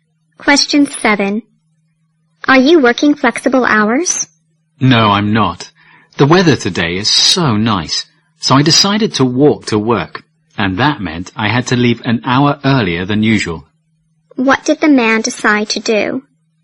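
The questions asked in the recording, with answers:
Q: What did the man decide to do?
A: Walk to work.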